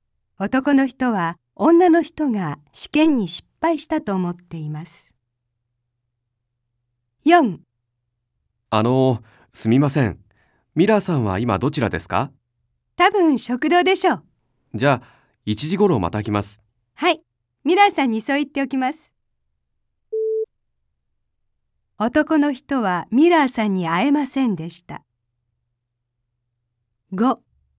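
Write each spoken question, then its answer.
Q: 男の人はミラーさんに会えませんでした。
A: ○(正しい)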